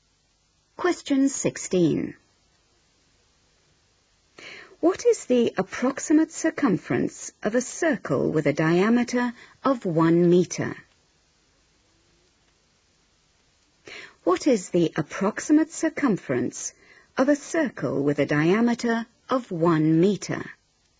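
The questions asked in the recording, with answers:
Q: What is the approximate circumference of a circle with a diameter of 1 meter?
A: About 3.14 m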